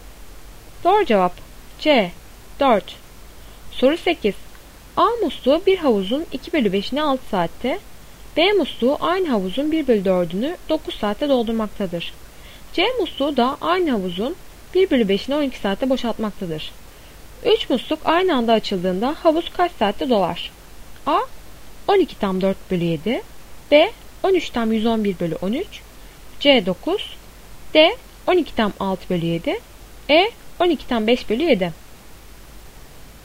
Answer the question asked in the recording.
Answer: Doğru cevap D. 12 tam 6 bölü 7.